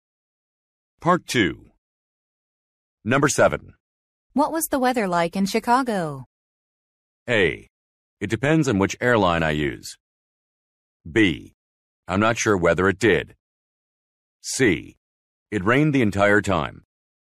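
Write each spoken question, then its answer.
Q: What was the weather like in Chicago?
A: C: It rained the entire time.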